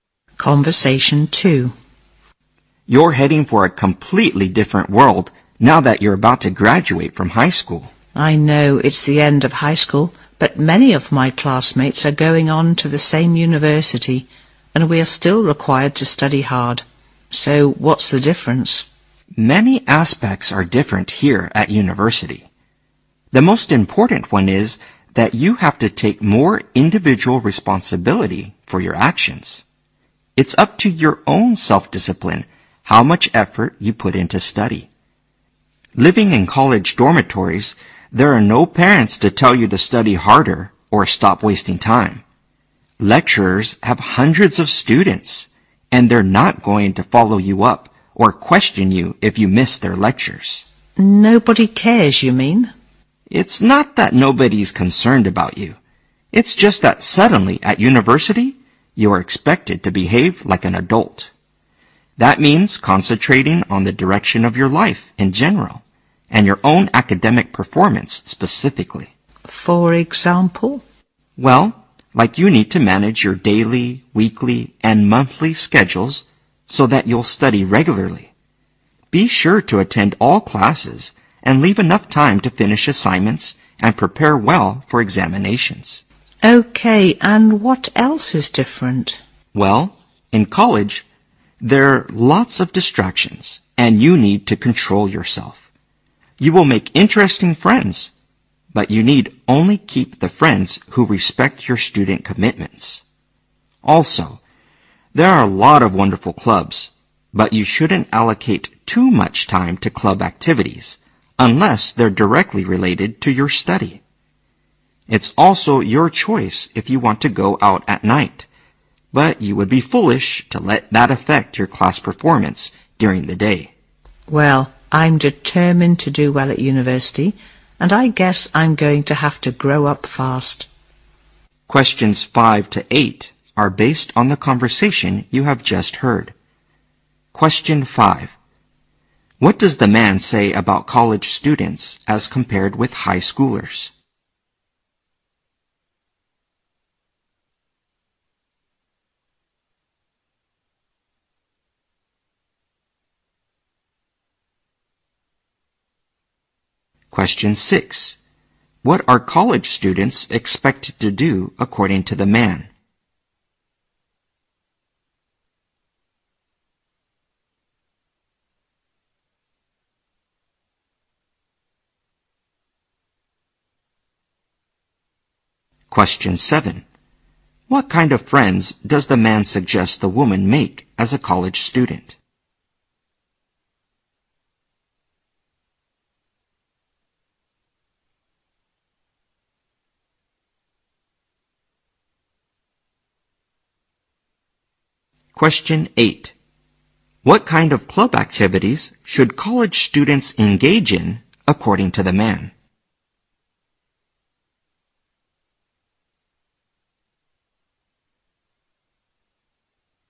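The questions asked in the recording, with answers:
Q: What does the man say about college students as compared with high schoolers?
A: They have to take more individual responsibility for their actions

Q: What are college students expected to do according to the man?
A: Behave like adults

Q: What kind of friends does the man suggest the woman make as a college student?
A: Friends who respect her student commitments

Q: What kind of club activities should college students engage in, according to the man?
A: Those directly related to their study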